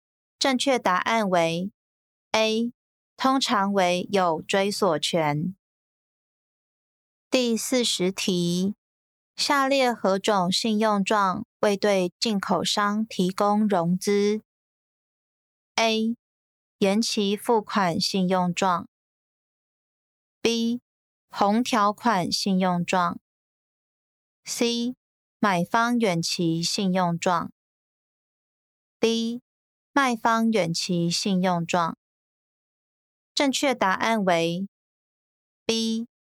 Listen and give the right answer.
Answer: 正确答案为 B.